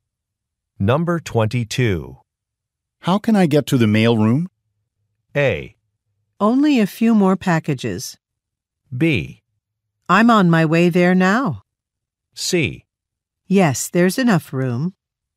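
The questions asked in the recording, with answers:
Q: How can I get to the mail room?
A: B: I'm on my way there now.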